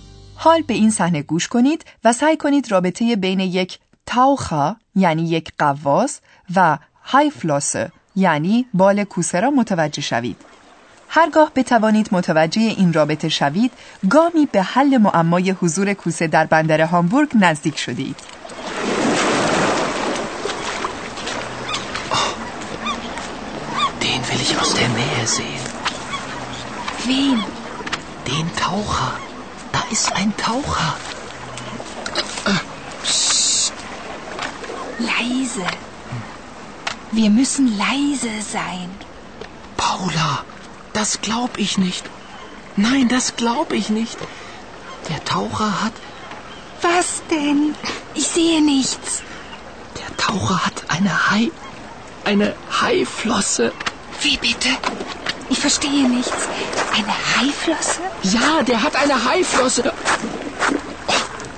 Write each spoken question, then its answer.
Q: حال به این صحنه گوش کنید و سعی کنید رابطه بین یک تاوخا یعنی یک غواص و های فلوس یعنی بال کوسه را متوجه شوید.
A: بنابراین معلوم می شود که این غواص یک بال کوسه به همراه داشته است